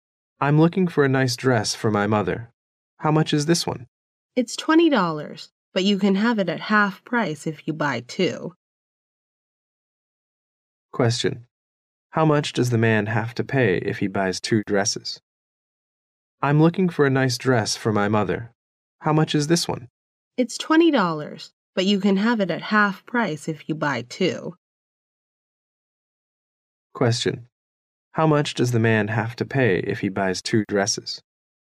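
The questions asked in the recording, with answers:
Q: How much does the man have to pay if he buys two dresses?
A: $20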